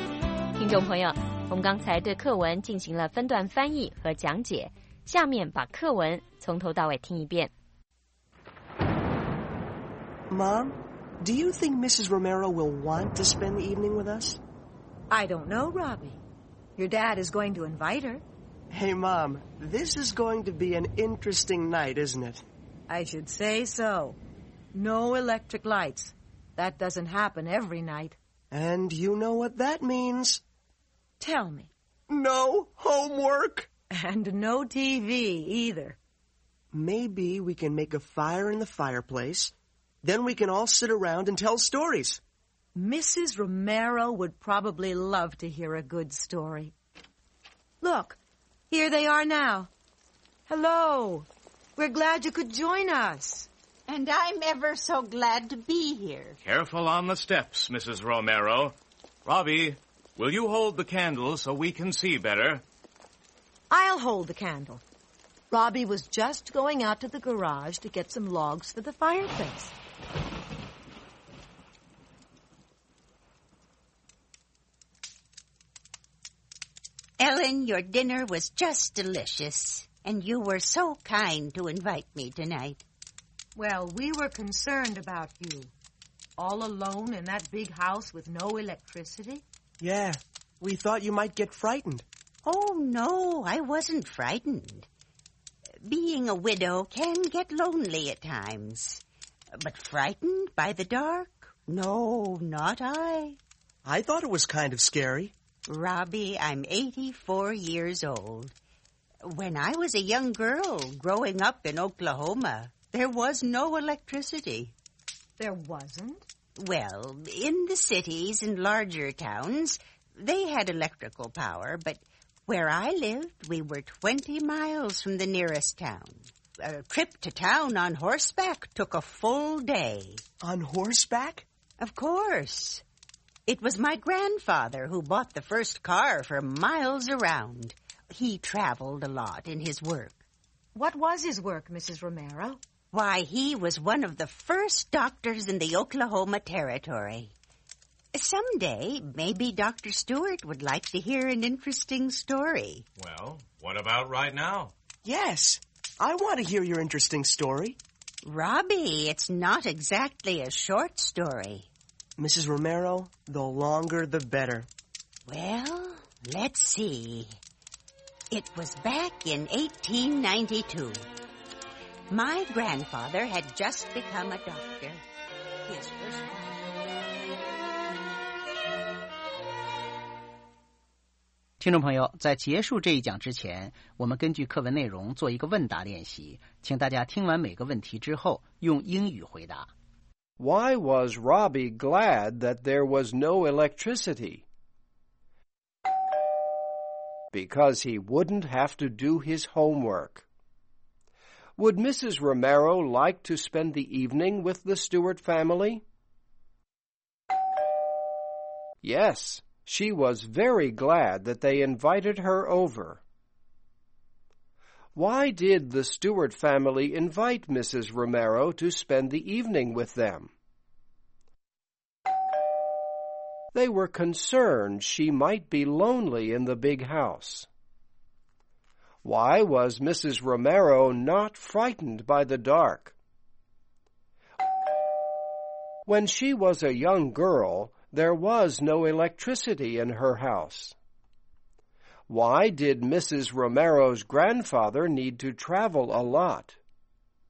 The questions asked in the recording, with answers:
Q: Why was Robbie glad that there was no electricity?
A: Because he wouldn't have to do his homework.

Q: Would Mrs. Romero like to spend the evening with the Stewart family?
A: Yes, she was very glad that they invited her over.

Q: Why did the Stewart family invite Mrs. Romero to spend the evening with them?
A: They were concerned she might be lonely in the big house.

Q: Why did Mrs. Romero's grandfather need to travel a lot?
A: Because he was a doctor in the Oklahoma Territory.